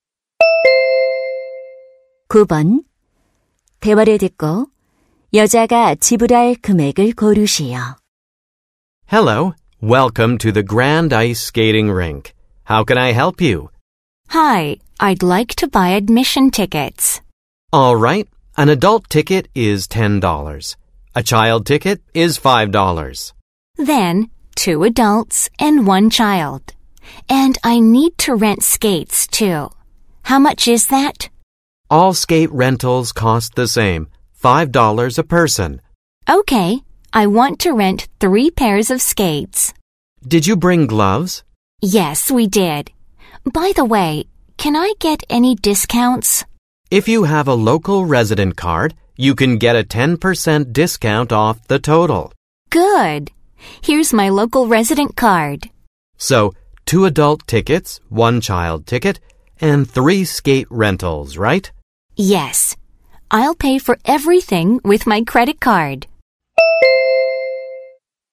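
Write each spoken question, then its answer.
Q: 대화를 듣고 여자가 지불할 금액을 고르시오.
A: $36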